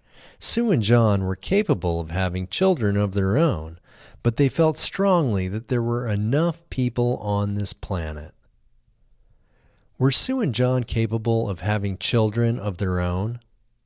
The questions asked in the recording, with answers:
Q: Were Sue and John capable of having children of their own?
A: Yes, Sue and John were capable of having children of their own.